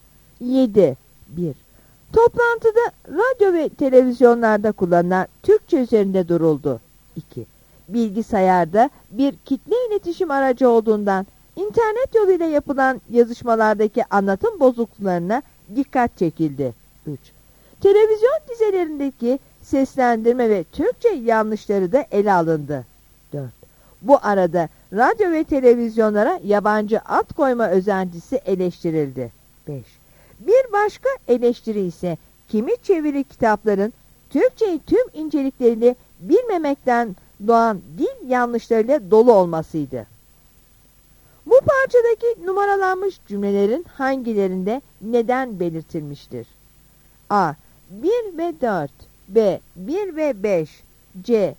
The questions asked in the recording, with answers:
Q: Bu parçadaki numaralanmış cümlelerin hangilerinde neden belirtilmiştir?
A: Yanıt D'dir.